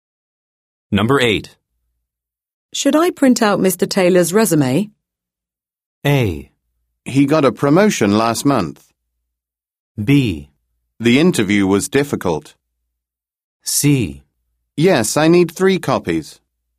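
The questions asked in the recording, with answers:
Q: Should I print out Mr. Taylor's resume?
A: C: Yes, I need 3 copies.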